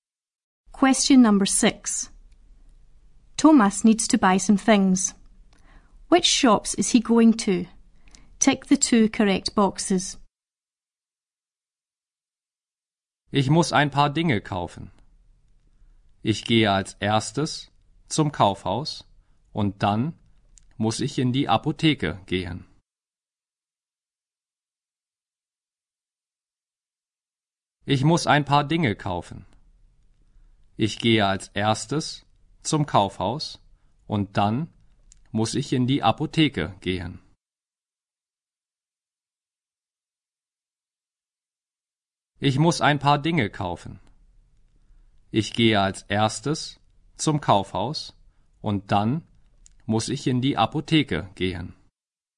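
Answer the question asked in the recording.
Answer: The department store and the chemist's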